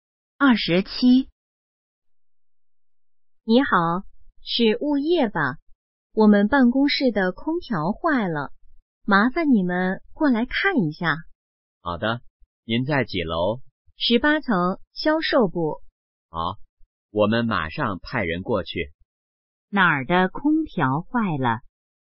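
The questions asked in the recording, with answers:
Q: 哪儿的空调坏了?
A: 18层销售部办公室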